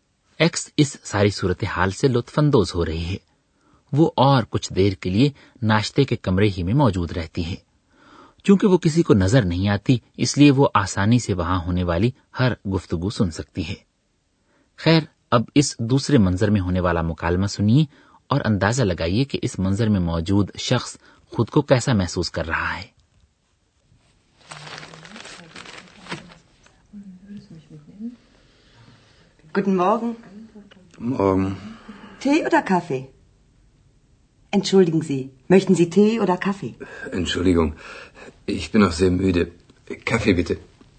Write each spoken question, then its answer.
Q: اندازہ لگائیے کہ اس منظر میں موجود شخص خود کو کیسا محسوس کر رہا ہے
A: وہ اتنا تھکا ہوا ہوتا ہے